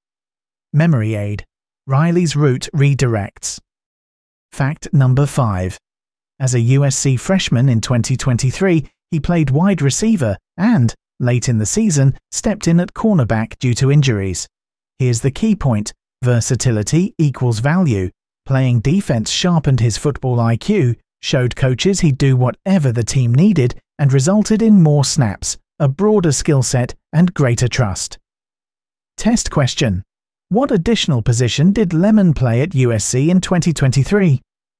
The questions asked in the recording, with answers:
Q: What additional position did Lemon play at USC in 2023?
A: Correct answer, cornerback.